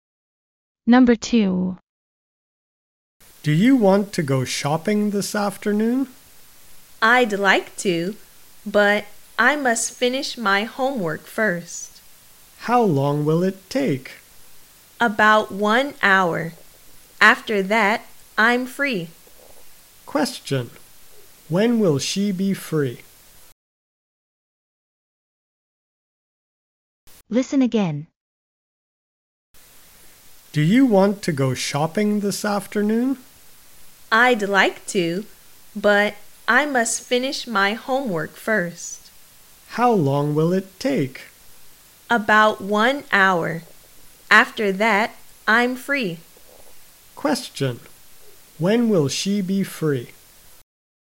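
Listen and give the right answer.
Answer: In about one hour, after finishing her homework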